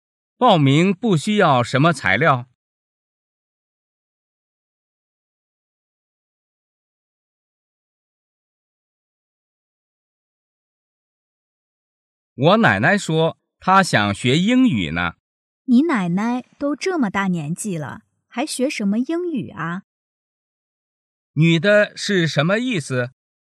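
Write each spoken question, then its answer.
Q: 女的是什么意思?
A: 奶奶年纪太大,不必学英语

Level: 汉语水平考试(MHK)三级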